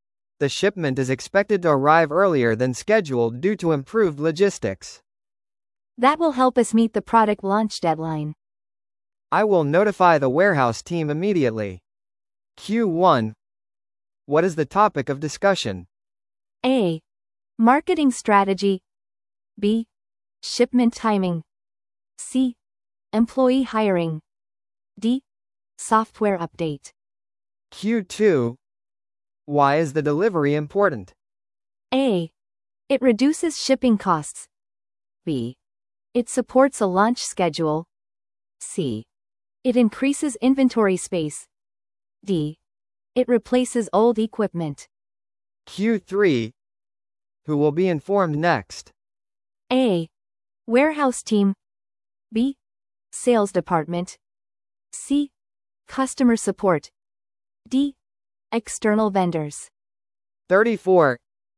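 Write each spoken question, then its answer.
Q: What is the topic of discussion?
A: B: Shipment timing.

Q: Why is the delivery important?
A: B: It supports a launch schedule.

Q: Who will be informed next?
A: A: Warehouse team.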